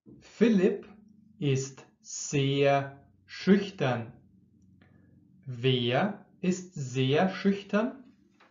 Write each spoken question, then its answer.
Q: Wer ist sehr schüchtern?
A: Philipp. Philipp ist sehr schüchtern.